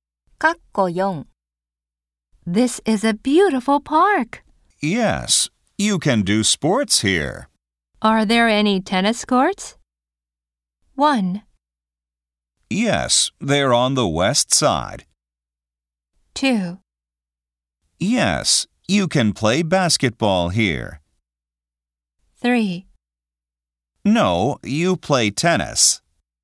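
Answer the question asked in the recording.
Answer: 1: Yes, they're on the west side.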